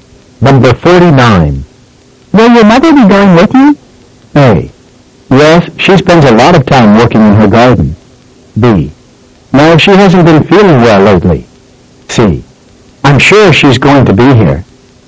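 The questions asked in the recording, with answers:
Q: Will your mother be going with you?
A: B: No, she hasn't been feeling well lately.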